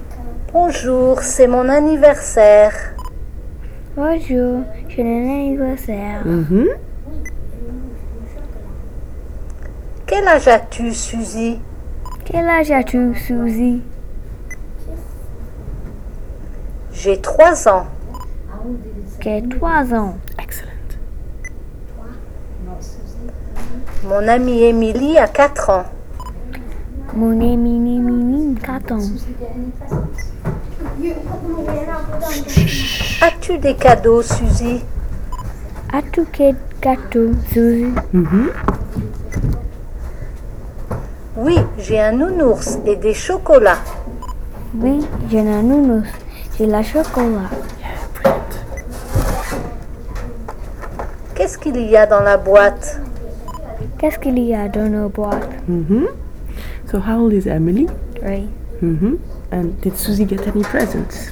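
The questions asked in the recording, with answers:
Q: And did Suzy get any presents?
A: Yes, a teddy bear and chocolates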